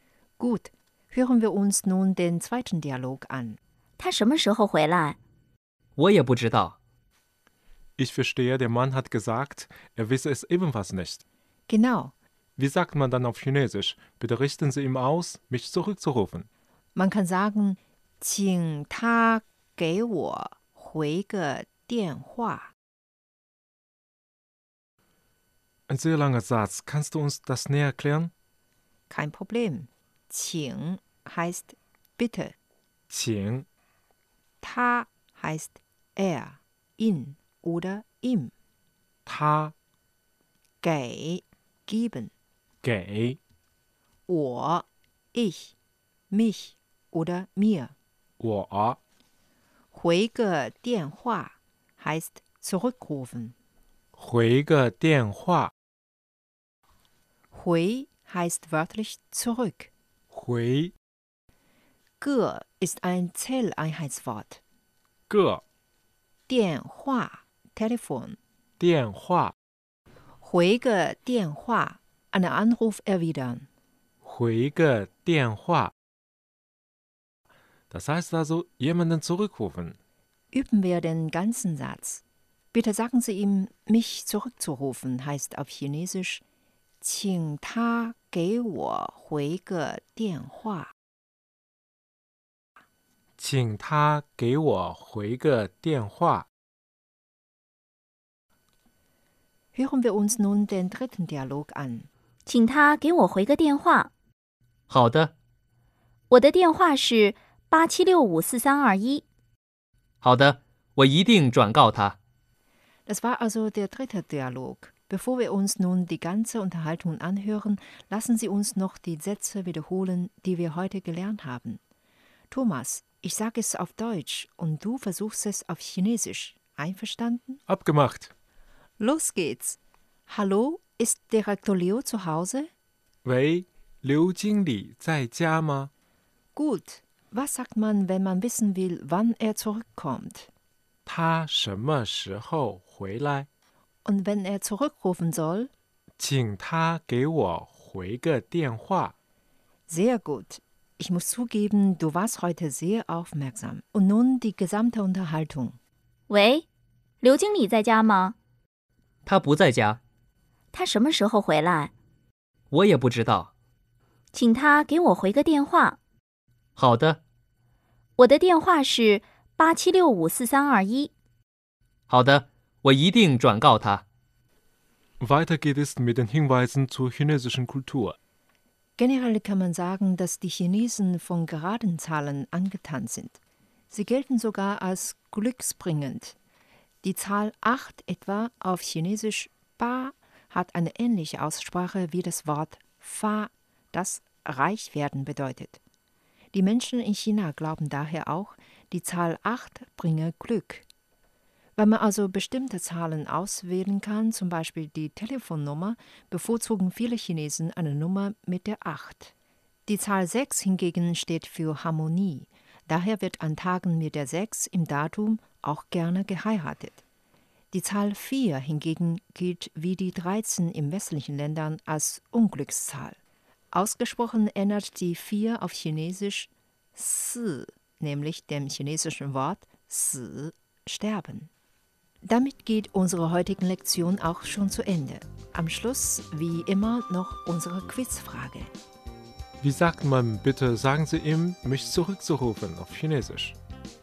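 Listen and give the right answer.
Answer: 请他给我回个电话 (Qing ta gei wo hui ge dianhua)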